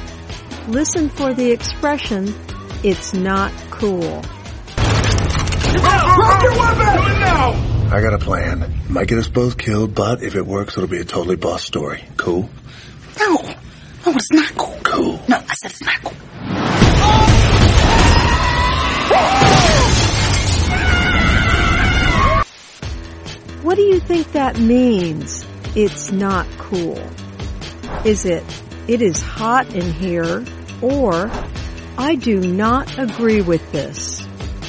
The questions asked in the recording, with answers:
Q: What do you think that means, it's not cool?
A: It's not cool means I do not agree with this.